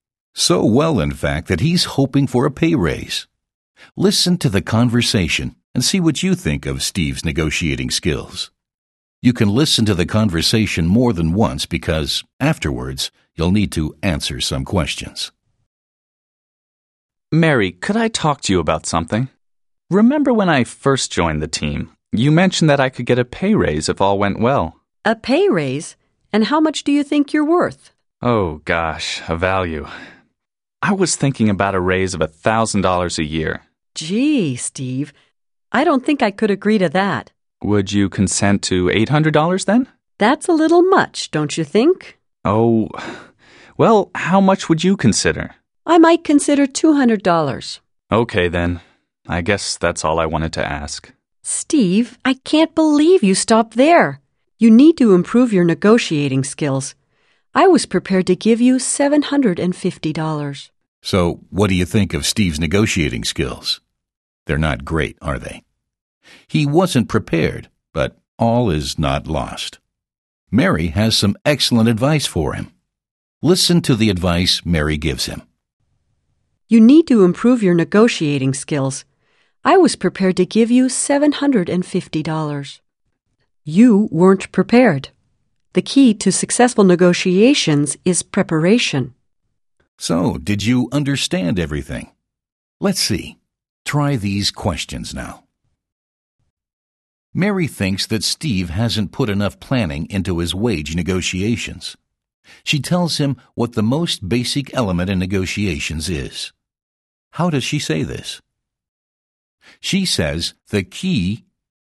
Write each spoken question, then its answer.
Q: How does she say this? She says the key...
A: She says the key to successful negotiations is preparation.